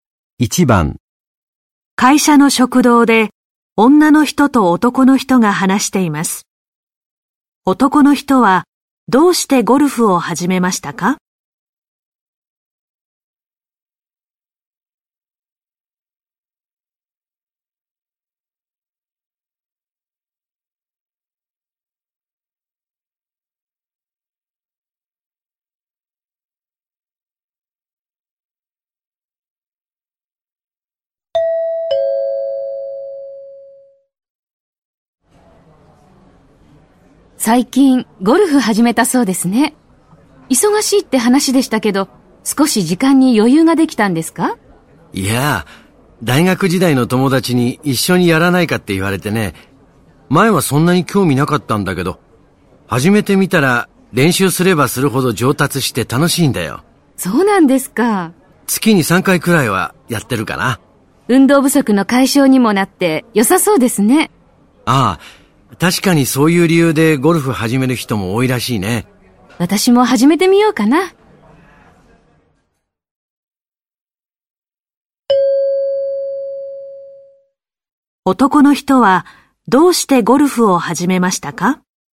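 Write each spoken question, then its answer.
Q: 男の人はどうしてゴルフを始めましたか?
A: 大学時代の友達に誘われたから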